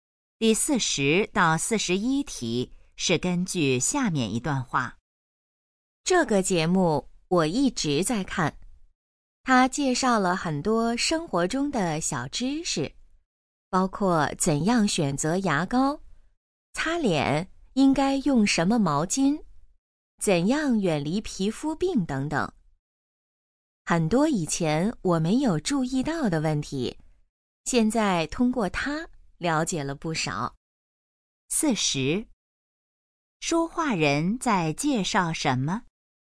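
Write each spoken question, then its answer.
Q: 说话人在介绍什么?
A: 一个电视节目

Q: 说话人了解了哪方面的知识?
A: 生活中的小知识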